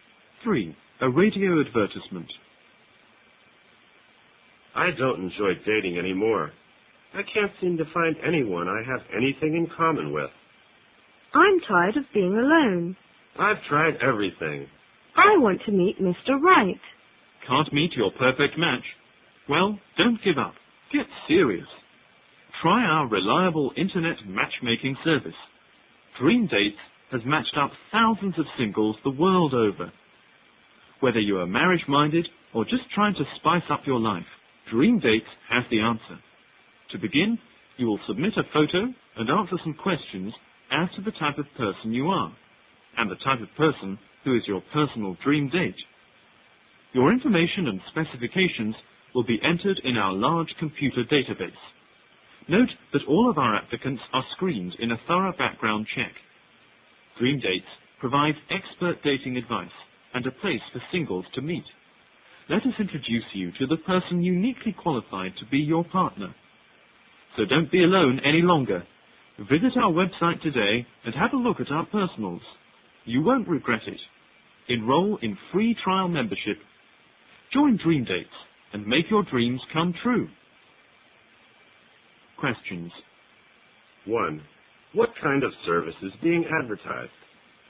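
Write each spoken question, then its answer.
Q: What kind of service is being advertised?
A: An internet dating (matchmaking) service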